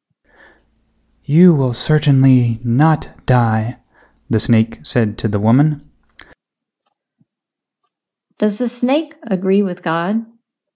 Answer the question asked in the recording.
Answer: No, the snake does not agree with God.